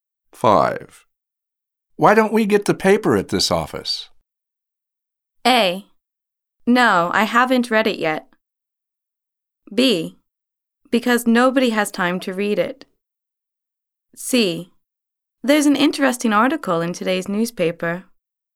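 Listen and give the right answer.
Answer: B: Because nobody has time to read it.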